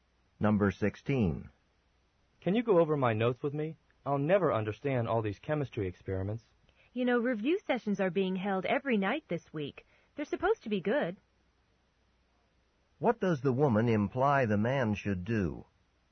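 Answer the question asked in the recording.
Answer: Go to the review sessions.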